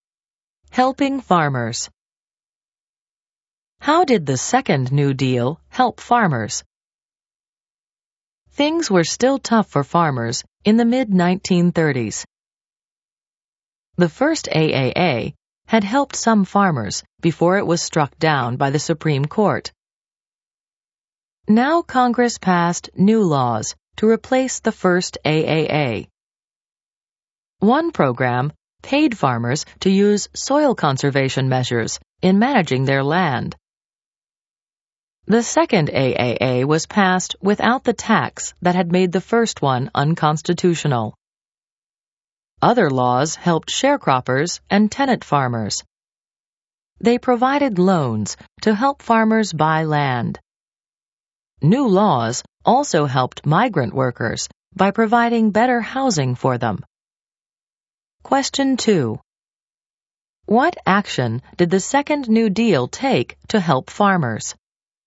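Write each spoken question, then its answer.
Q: What action did the Second New Deal take to help farmers?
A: It paid farmers for soil conservation, passed a second AAA, gave loans to buy land, and provided better housing for migrant workers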